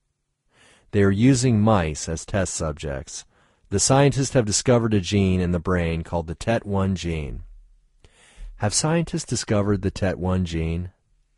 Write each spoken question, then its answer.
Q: Have scientists discovered the TET1 gene?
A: Yes, scientists have discovered the TET1 gene.